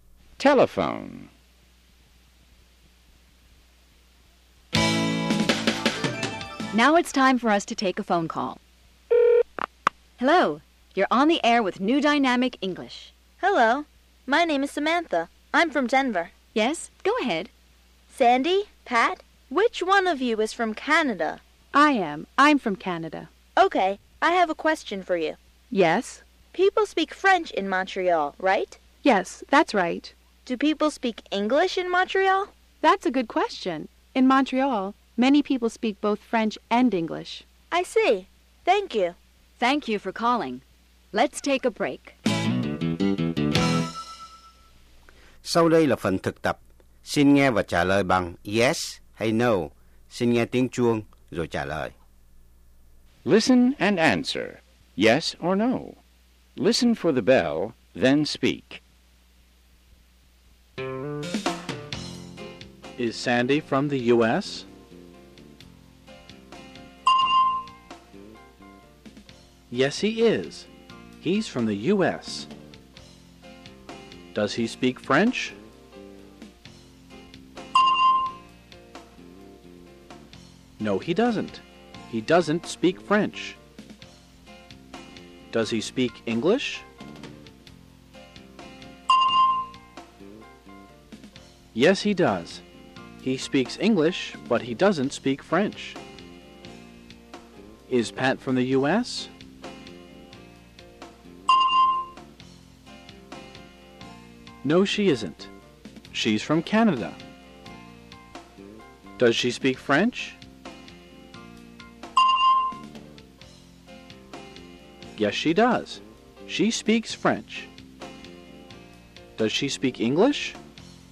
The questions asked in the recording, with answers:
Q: Is Sandy from the U.S.?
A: Yes, he is. He's from the U.S.

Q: Does he speak French?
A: No, he doesn't. He doesn't speak French.

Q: Does he speak English?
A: Yes, he does. He speaks English, but he doesn't speak French.

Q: Is Pat from the U.S.?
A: No, she isn't. She's from Canada.